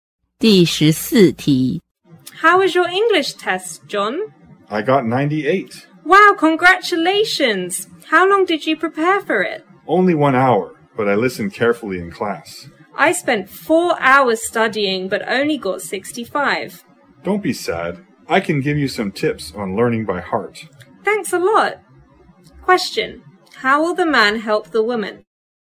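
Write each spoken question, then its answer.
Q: How will the man help the woman?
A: By giving her tips on learning by heart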